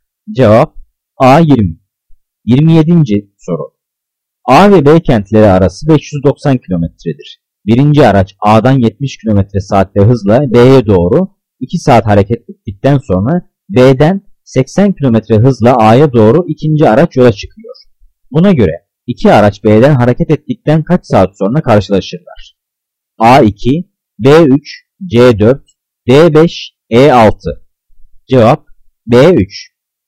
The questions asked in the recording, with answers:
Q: Buna göre iki araç B'den hareket ettikten kaç saat sonra karşılaşırlar?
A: Cevap B3.